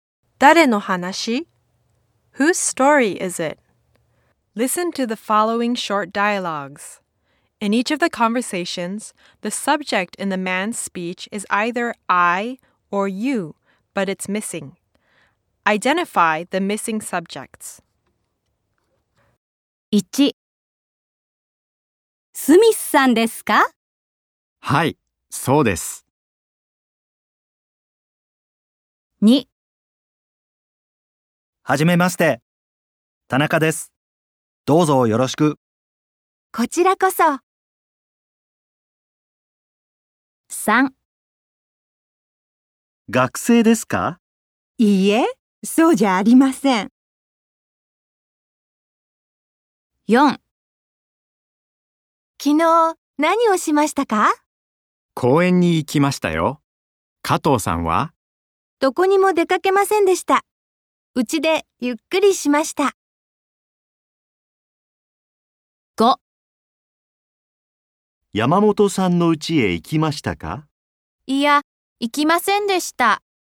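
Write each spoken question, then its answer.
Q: Identify the missing subjects.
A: you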